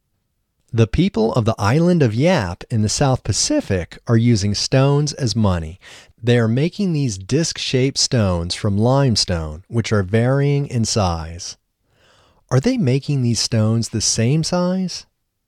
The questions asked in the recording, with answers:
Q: Are they making these stones the same size?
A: No, they aren't making these stones the same size.